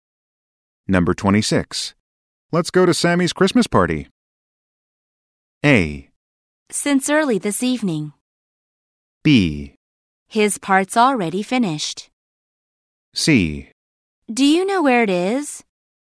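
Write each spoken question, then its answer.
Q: Let's go to Sammy's Christmas party.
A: C: Do you know where it is?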